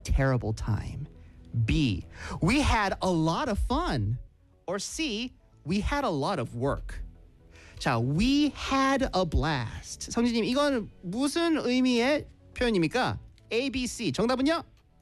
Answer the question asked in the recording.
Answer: 정답은 B, we had a lot of fun.